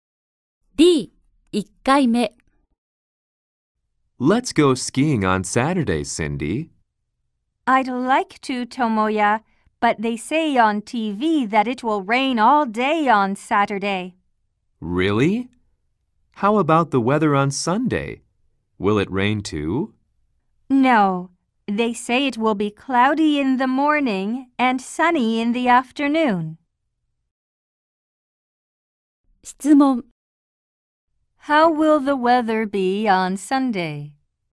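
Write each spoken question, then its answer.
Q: How will the weather be on Sunday?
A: Cloudy in the morning and sunny in the afternoon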